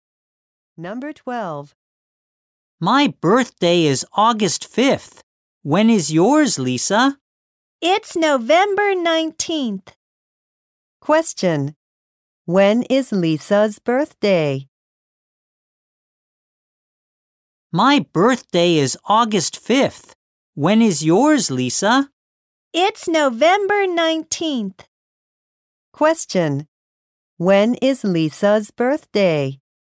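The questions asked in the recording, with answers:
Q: When is Lisa's birthday?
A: November 19th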